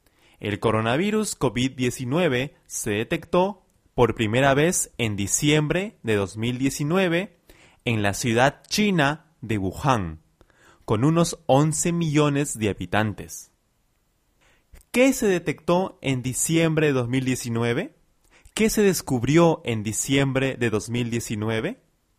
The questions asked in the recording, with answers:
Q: ¿Qué se detectó en diciembre de 2019?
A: En diciembre de 2019 se detectó el coronavirus COVID-19.